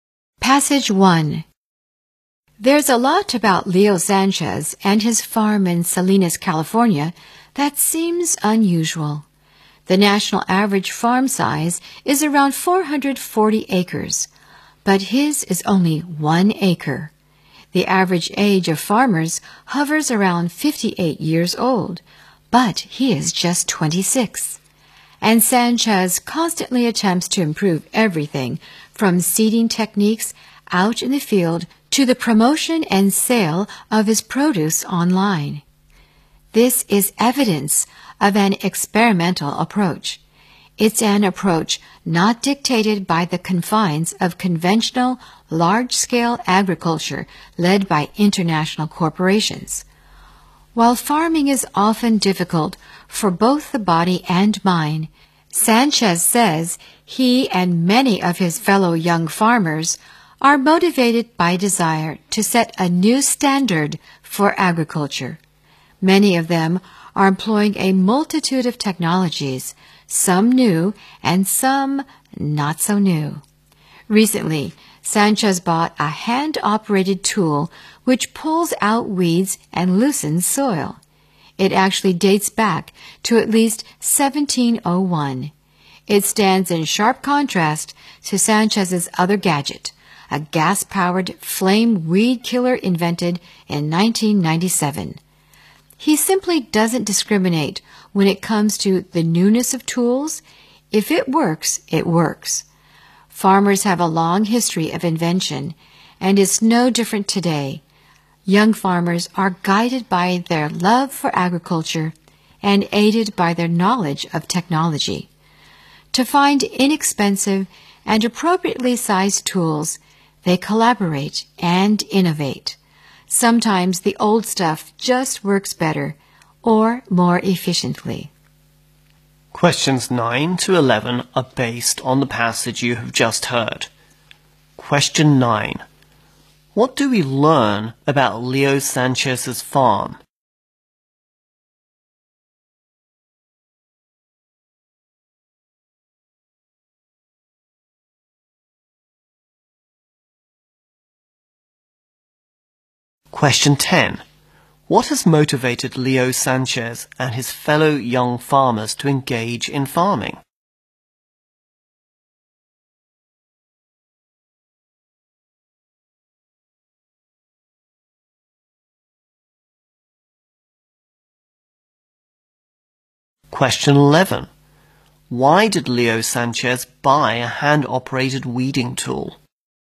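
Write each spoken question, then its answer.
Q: What do we learn about Leo Sanchez's farm?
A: It is only one acre.

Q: What has motivated Leo Sanchez and his fellow young farmers to engage in farming?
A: The desire to set a new standard for agriculture.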